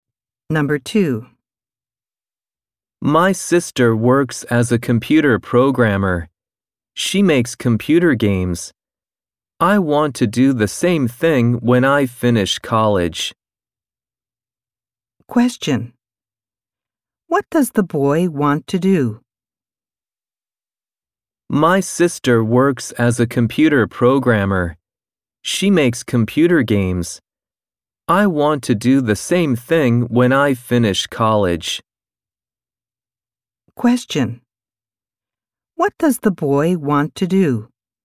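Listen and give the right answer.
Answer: Make computer games (be a computer programmer)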